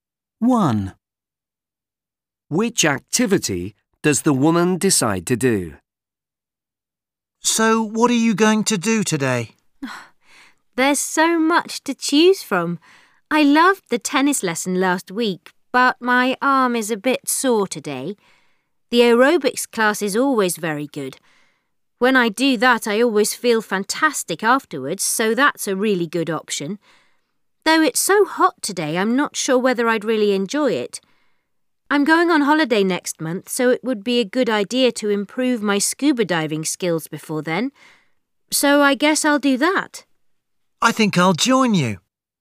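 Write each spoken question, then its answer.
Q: Which activity does the woman decide to do?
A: scuba diving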